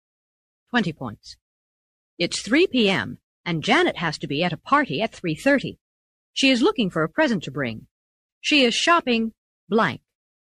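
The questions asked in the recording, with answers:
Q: She is shopping blank.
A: at the last minute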